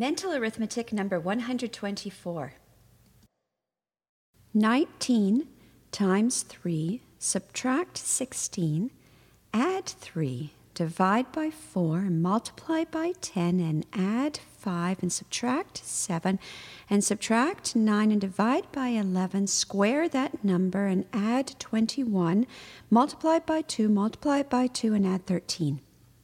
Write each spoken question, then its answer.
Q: 19 times 3, subtract 16, add 3, divide by 4, multiply by 10, and add 5, and subtract 7, and subtract 9, and divide by 11, square that number, and add 21, multiply by 2, multiply by 2, and add 13.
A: The answer is 421.